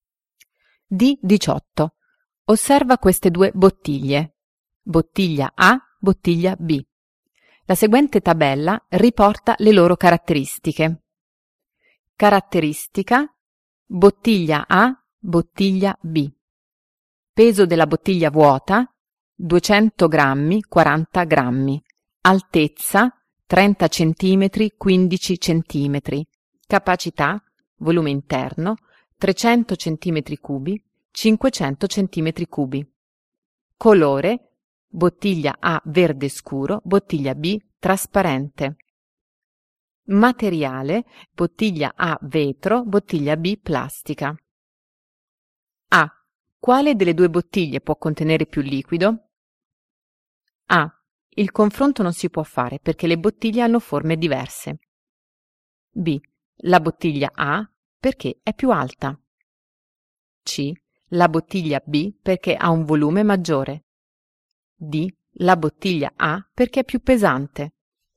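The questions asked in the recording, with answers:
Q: Quale delle due bottiglie può contenere più liquido?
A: C: La bottiglia B perché ha un volume maggiore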